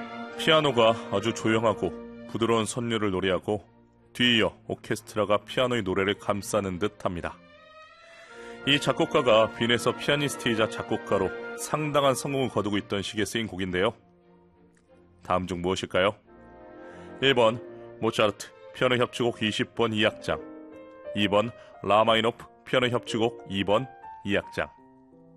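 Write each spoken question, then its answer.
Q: 다음 중 무엇일까요? 1번 모차르트 피아노 협주곡 20번 2악장, 2번 라마이노프 피아노 협주곡 2번 2악장.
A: 1: 모차르트 피아노 협주곡 20번 2악장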